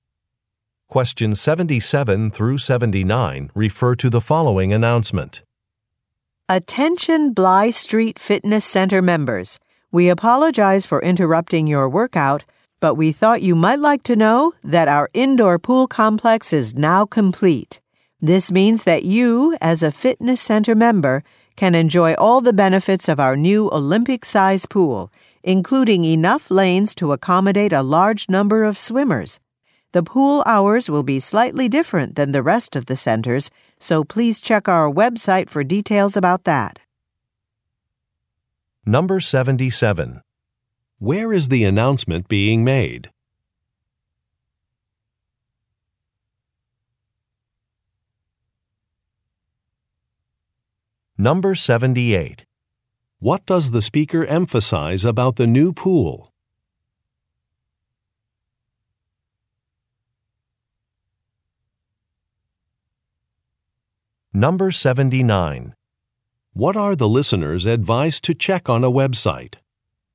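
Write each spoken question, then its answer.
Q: Where is the announcement being made?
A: At a fitness center

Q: What does the speaker emphasize about the new pool?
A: Its size (enough lanes for many swimmers)

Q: What are the listeners advised to check on a website?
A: The pool hours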